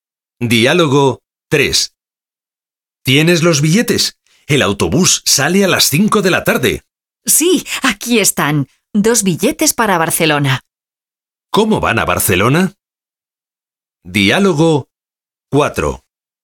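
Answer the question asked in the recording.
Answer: En autobús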